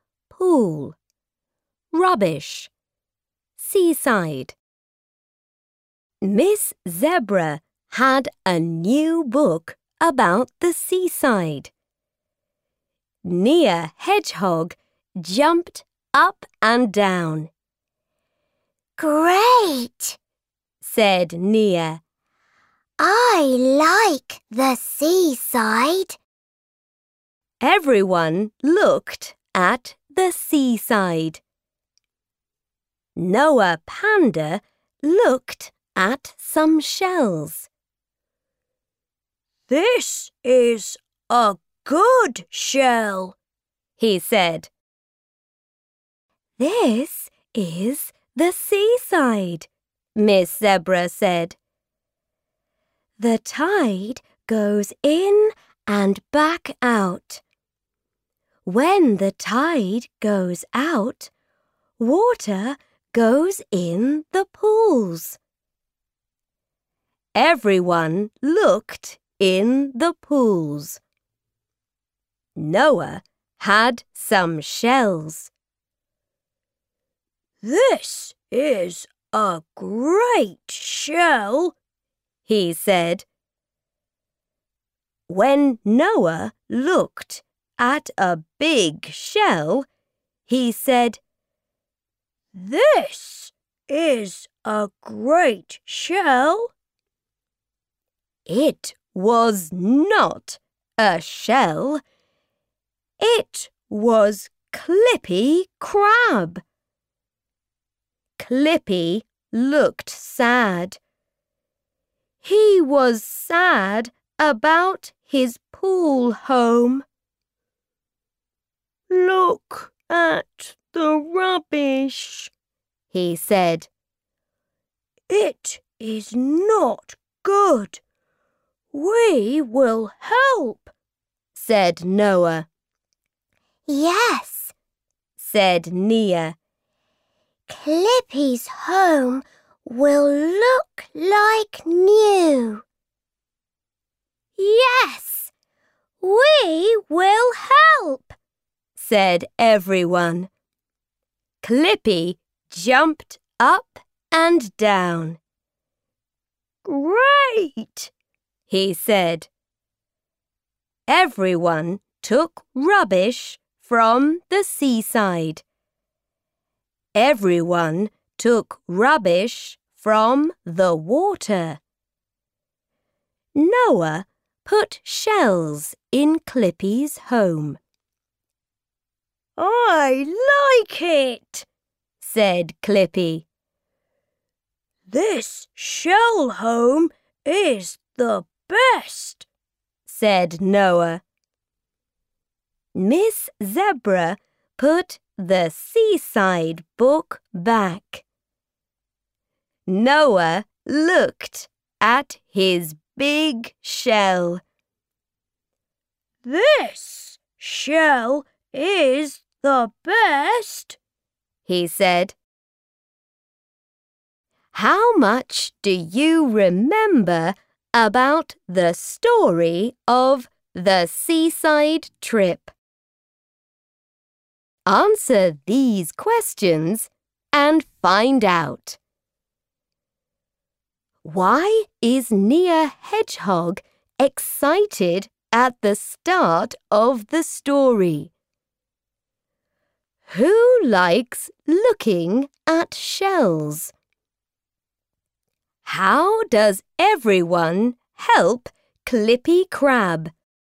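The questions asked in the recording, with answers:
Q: Why is Near Hedgehog excited at the start of the story?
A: Because Miss Zebra had a new book about the seaside, and Nia likes the seaside

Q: Who likes looking at shells?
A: Noah Panda

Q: How does everyone help Clippy Crab?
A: They take rubbish from the seaside and the water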